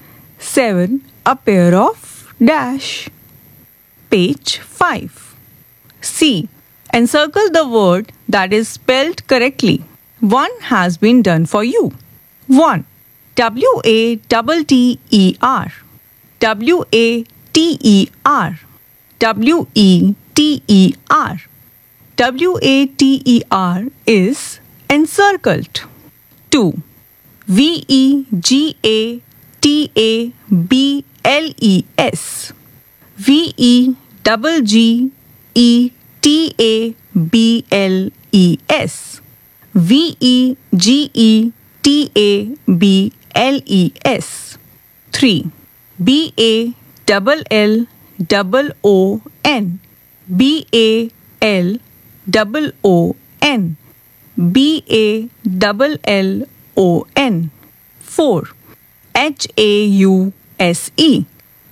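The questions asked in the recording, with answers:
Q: V-E-G-A-T-A-B-L-E-S. V-E-G-G-E-T-A-B-L-E-S. V-E-G-E-T-A-B-L-E-S.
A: V-E-G-E-T-A-B-L-E-S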